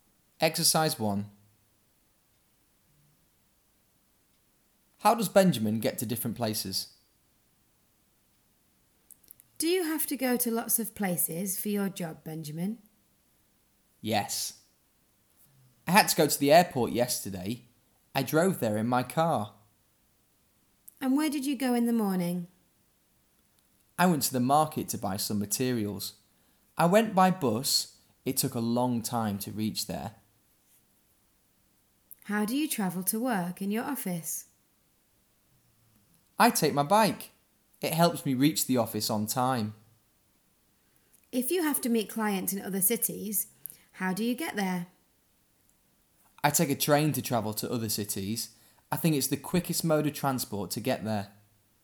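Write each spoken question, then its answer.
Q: How does Benjamin get to different places?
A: Airport by car, market by bus, office by bike, other cities by train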